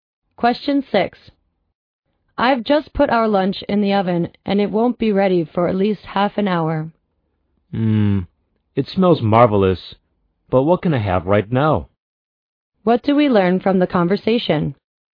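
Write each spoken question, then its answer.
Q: What do we learn from the conversation?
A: The man is hungry and wants something to eat right now.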